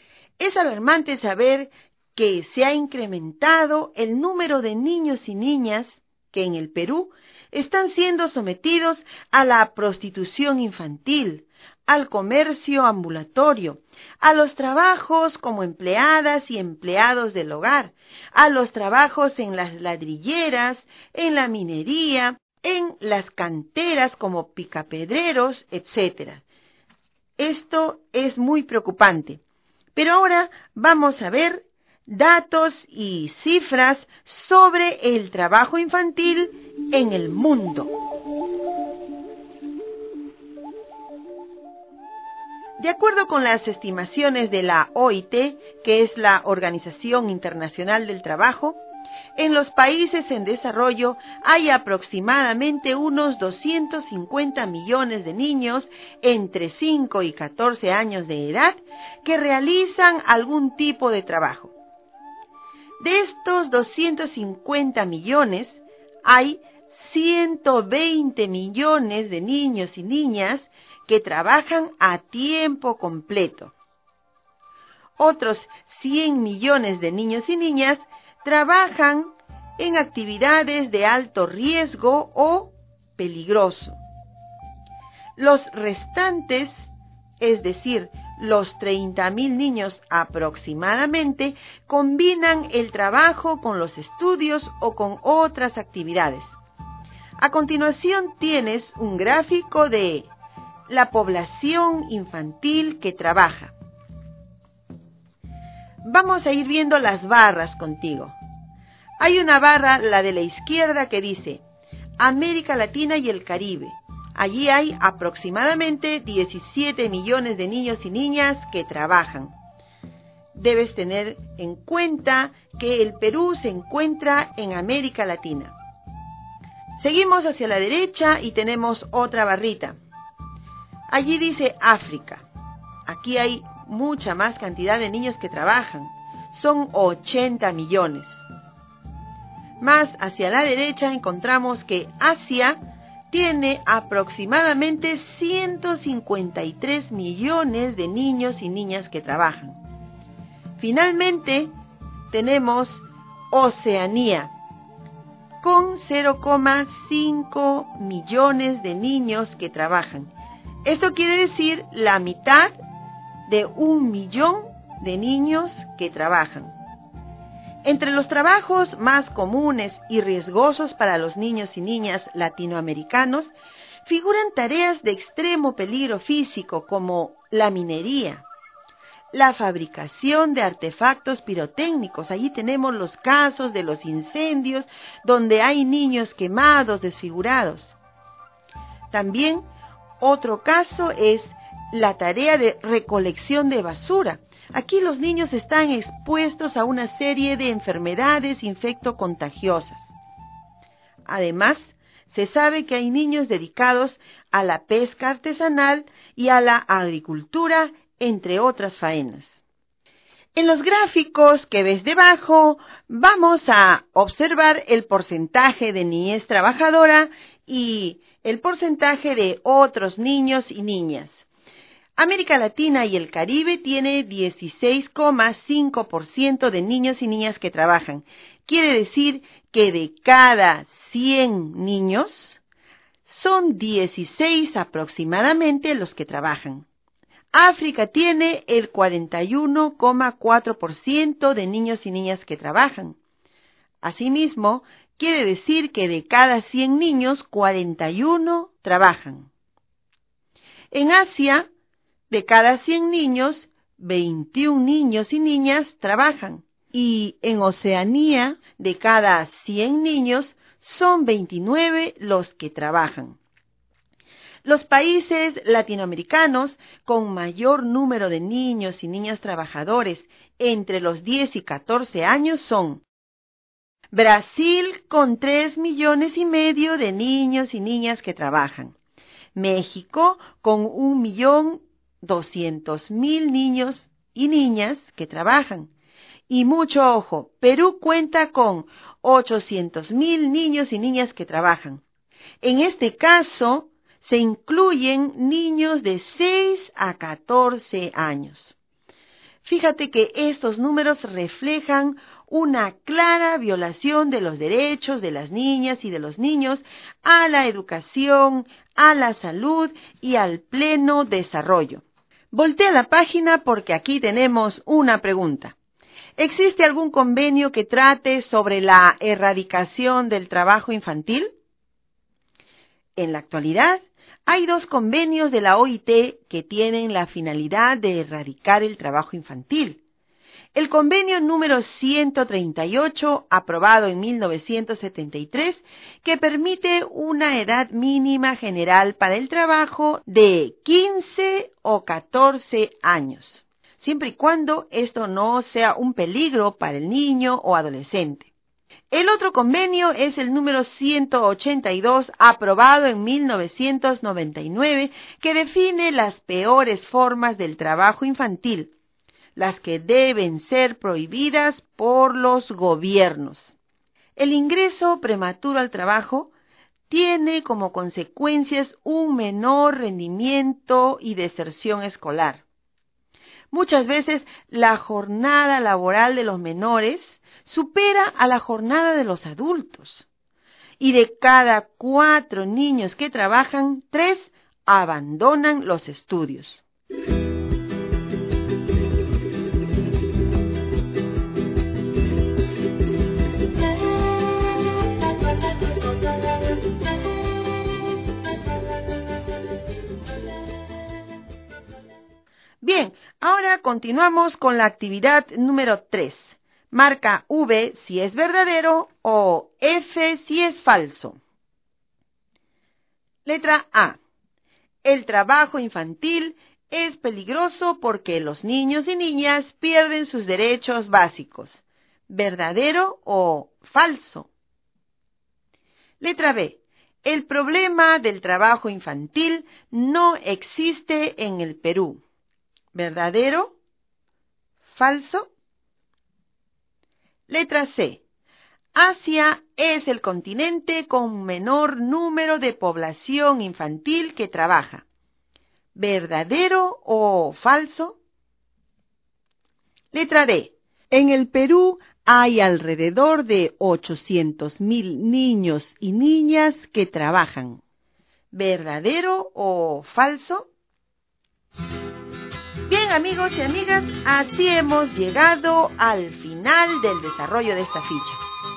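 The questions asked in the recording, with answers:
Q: El trabajo infantil es peligroso porque los niños y niñas pierden sus derechos básicos.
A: Verdadero

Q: El problema del trabajo infantil no existe en el Perú.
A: Falso

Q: Asia es el continente con menor número de población infantil que trabaja.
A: Falso

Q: En el Perú hay alrededor de 800.000 niños y niñas que trabajan.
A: Verdadero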